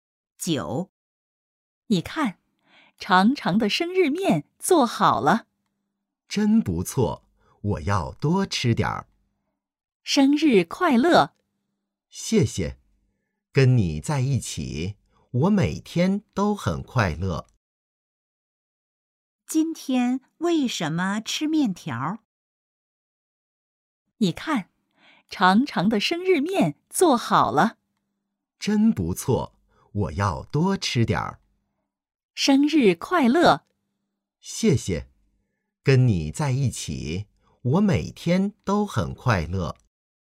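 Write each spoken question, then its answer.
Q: 今天为什么吃面条?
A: 今天是生日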